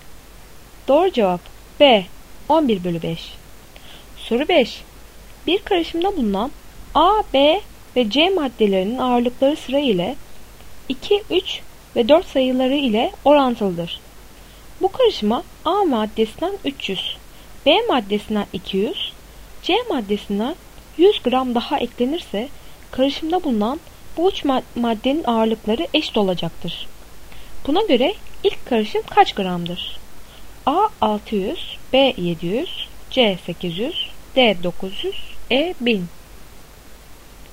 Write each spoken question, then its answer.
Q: Buna göre ilk karışım kaç gramdır?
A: Doğru cevap D 900.